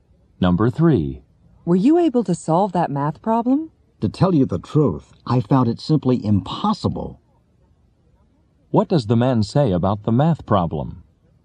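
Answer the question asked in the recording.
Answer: He couldn't solve it; it was impossible.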